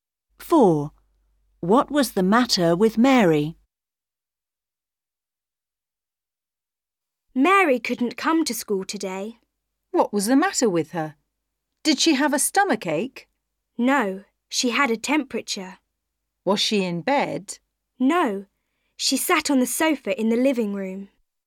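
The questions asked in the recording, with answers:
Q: What was the matter with Mary?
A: she had a temperature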